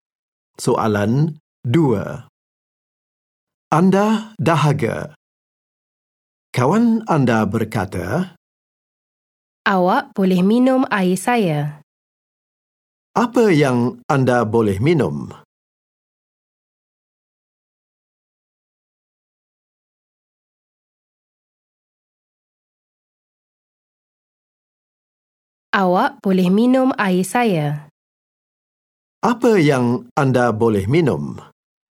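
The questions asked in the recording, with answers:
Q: Apa yang anda boleh minum?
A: Air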